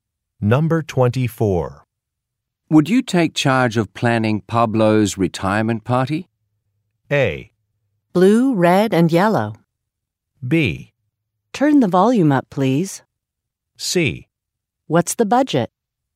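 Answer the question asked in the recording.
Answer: C: What's the budget?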